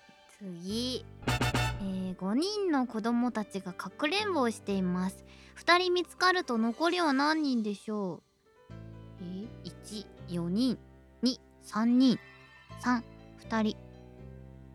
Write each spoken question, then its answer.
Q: 5人の子供たちがかくれんぼをしています。2人見つかると残りは何人でしょう。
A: 正解は3番の2人。